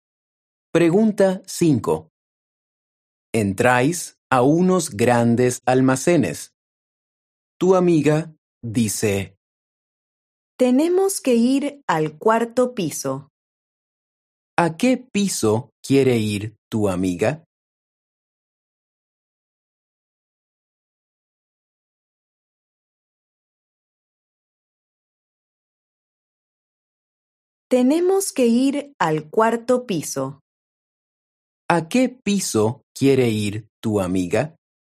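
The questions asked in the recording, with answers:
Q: ¿A qué piso quiere ir tu amiga?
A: al cuarto piso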